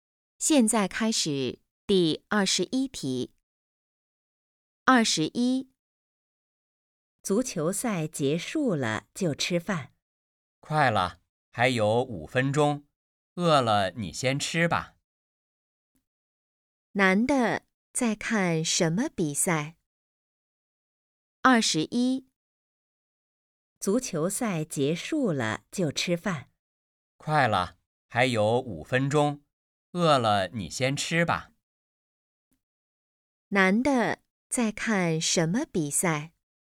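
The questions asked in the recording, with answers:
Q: 男的在看什么比赛?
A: 足球赛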